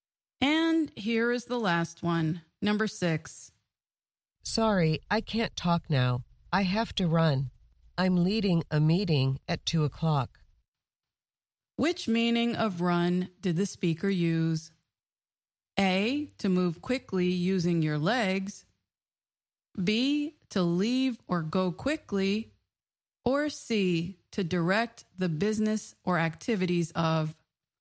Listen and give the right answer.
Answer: The answer is B, to leave or go quickly.